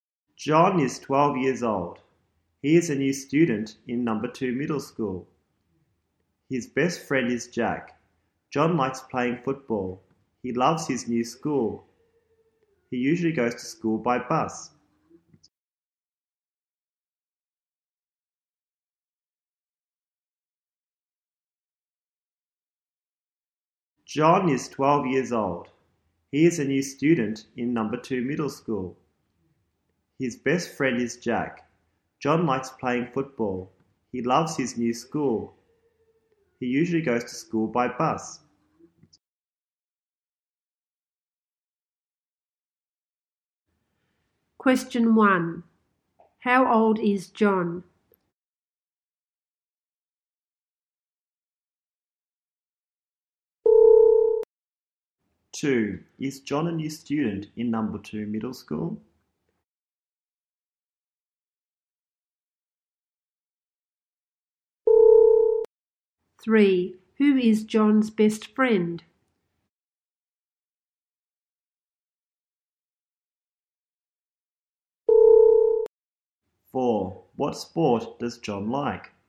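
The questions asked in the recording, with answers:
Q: How old is John?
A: 12 years old

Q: Is John a new student in number 2 middle school?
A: Yes, he is

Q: Who is John's best friend?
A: Jack

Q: What sport does John like?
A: Football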